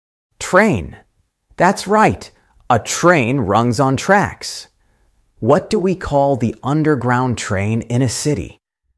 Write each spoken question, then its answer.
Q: What do we call the underground train in a city?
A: Subway. Correct. The subway goes under the city.